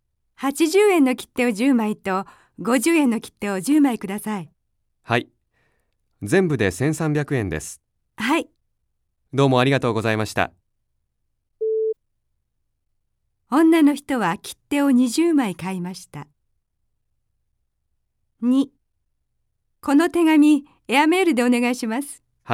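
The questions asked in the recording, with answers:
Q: 女の人は切手を20枚買いました。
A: はい(正しい)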